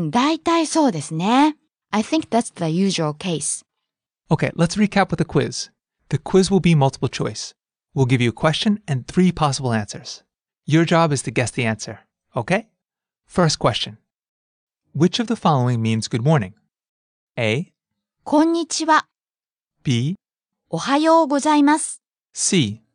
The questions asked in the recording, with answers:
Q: Which of the following means good morning?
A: B. おはようございます。